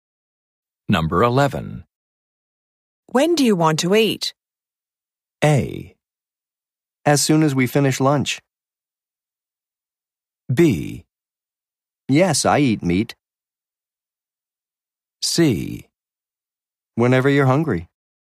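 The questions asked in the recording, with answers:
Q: When do you want to eat?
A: C: Whenever you're hungry.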